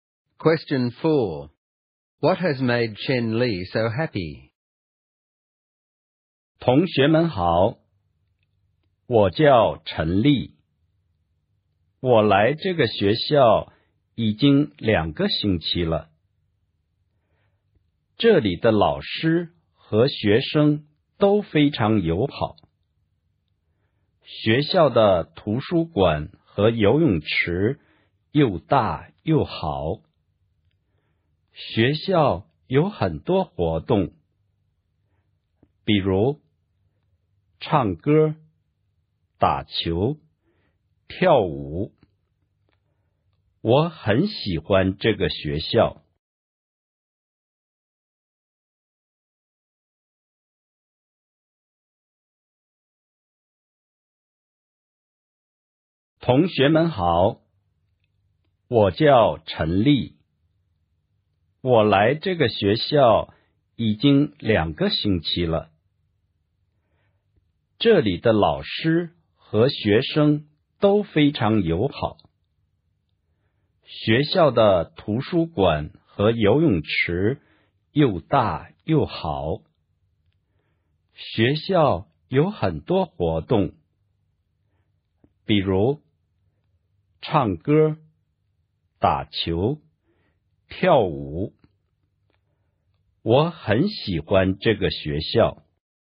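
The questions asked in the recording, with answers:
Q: What has made Chen Li so happy?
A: Her new school: friendly teachers and students, a big good library and pool, many activities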